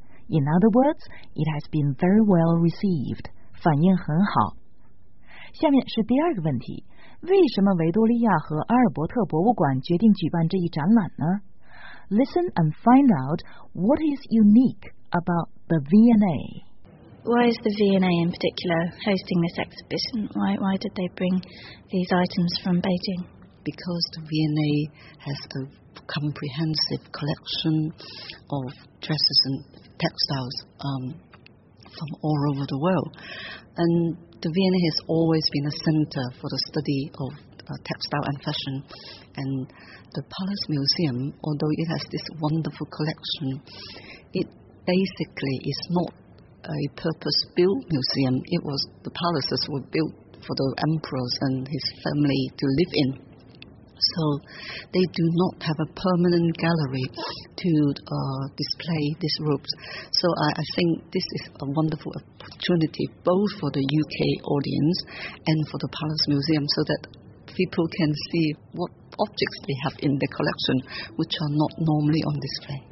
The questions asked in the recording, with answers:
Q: Listen and find out what is unique about the V&A.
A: 听出来了吗?The V&A 一直是纺织时装研究的中心,女裙和纺织品收集齐全,而故宫没有专门的永久性的展厅。